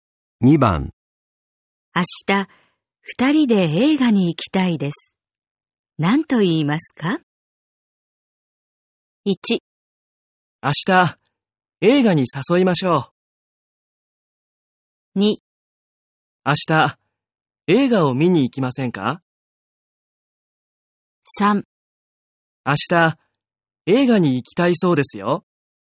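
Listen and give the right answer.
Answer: 2: 明日、映画を見に行きませんか?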